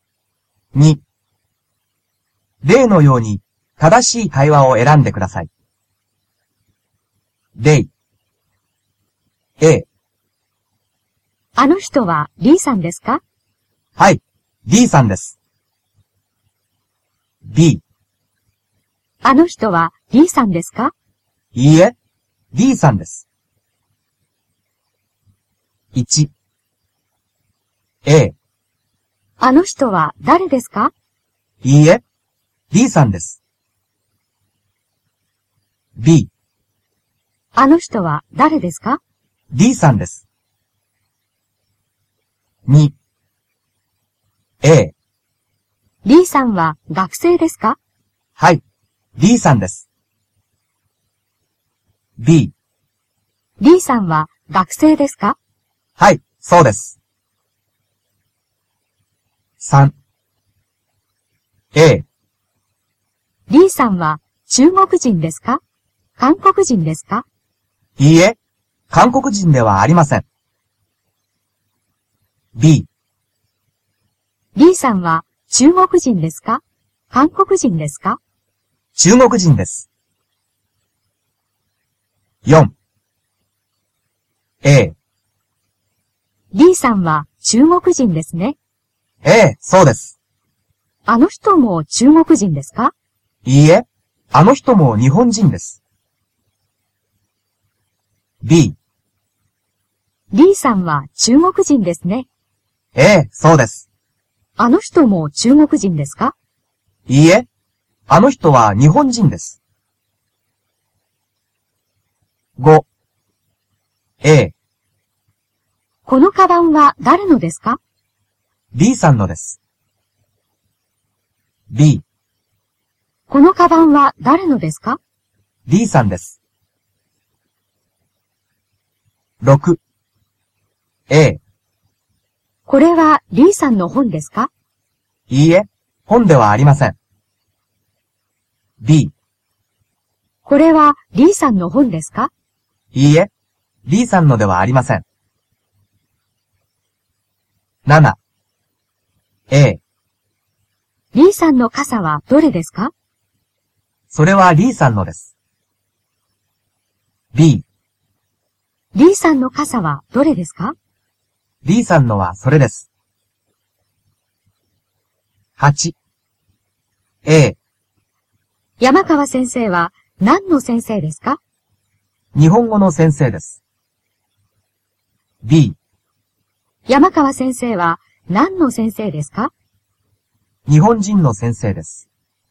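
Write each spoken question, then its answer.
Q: あの人は誰ですか?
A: B: D さんです。

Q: D さんは学生ですか?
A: B: はい、そうです。

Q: Bさんは中国人ですか?韓国人ですか?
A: B: 中国人です。

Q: あの人も中国人ですか?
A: B: いいえ、あの人は日本人です。

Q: このカバンは誰のですか?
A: A: B さんのです。

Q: これは D さんの本ですか?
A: B: いいえ、D さんのではありません。

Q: D さんの傘はどれですか?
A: B: D さんのはそれです。

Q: 山川先生は何の先生ですか?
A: A: 日本語の先生です。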